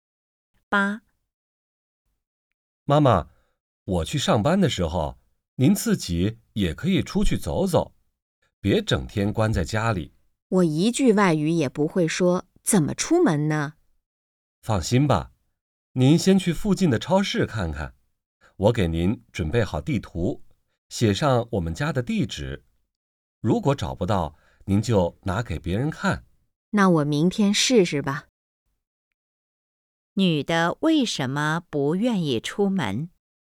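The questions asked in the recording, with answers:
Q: 女的为什么不愿意出门?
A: 一句外语也不会说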